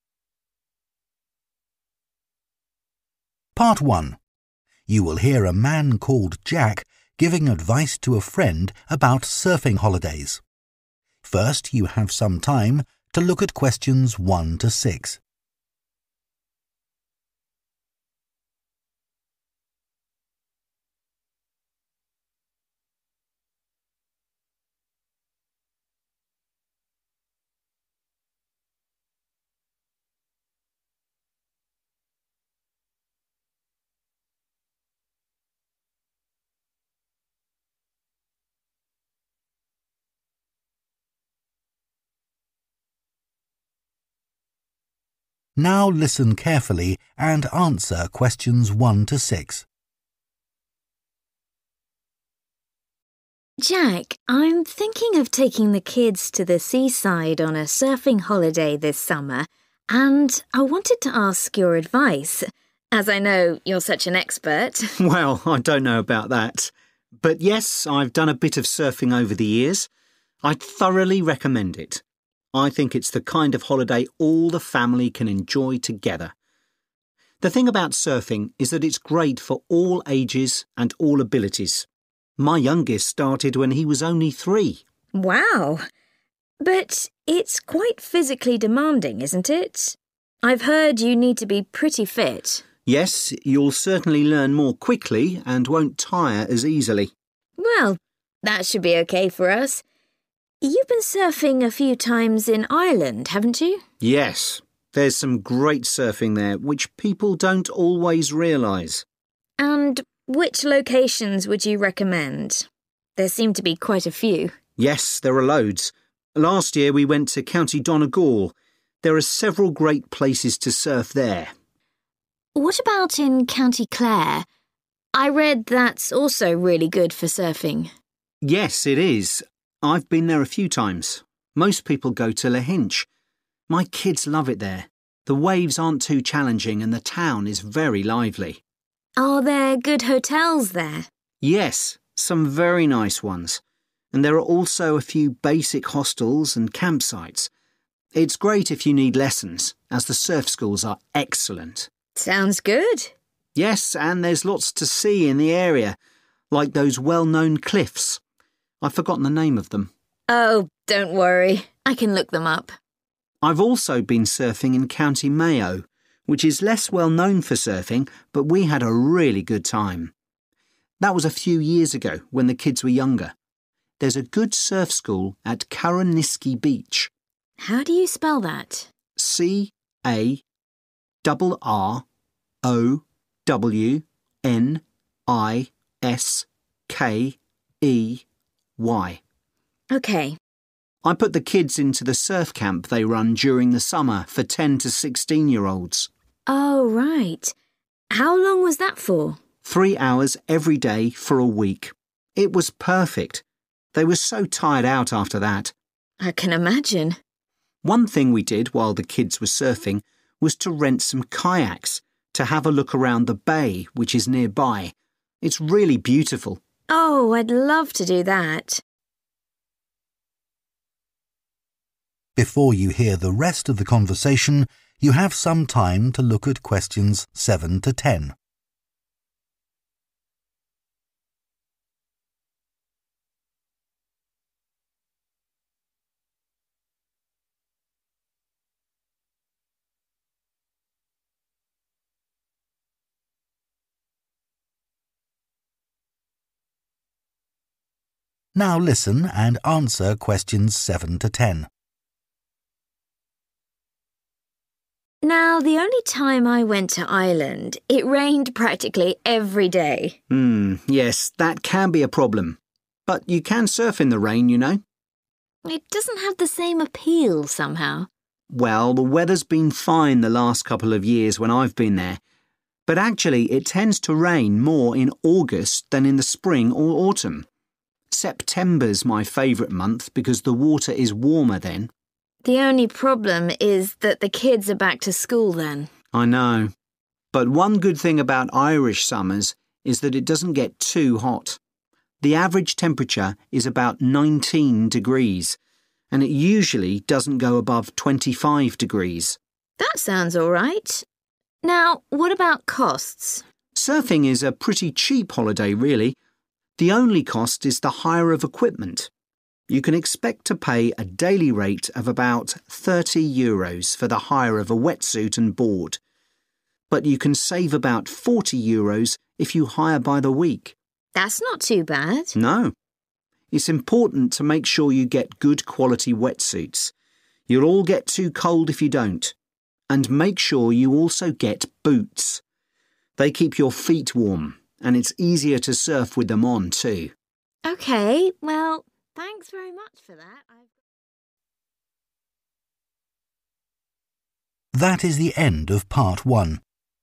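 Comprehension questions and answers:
Complete the notes below.Write ONE WORD AND/OR A NUMBER for each answer.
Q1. Recommends surfing for 1 ....... holidays in the summer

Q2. Need to be quite 2 .....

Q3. Lahinch has some good quality 3 ..... and surf schools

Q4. Good surf school at 4 ..... beach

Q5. Surf camp lasts for one 5 ......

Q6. Can also explore the local 6 .... by kayak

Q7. Best month to go: 7 .......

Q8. Average temperature in summer: approx. 8 ...... degrees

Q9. Wetsuit and surfboard: 9 ..... euros per day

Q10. Also advisable to hire 10 ..... for warmth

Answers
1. family
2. fit
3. hotels
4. Carrowniskey
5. week
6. bay
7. September
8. 19
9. 30
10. boots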